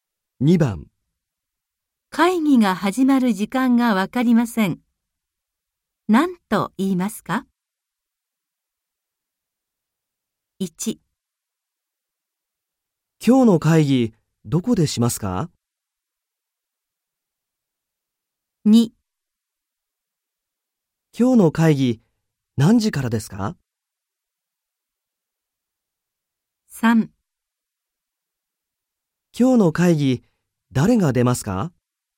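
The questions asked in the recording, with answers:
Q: 会議が始まる時間がわかりません。何と言いますか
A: 2: 今日の会議何時からですか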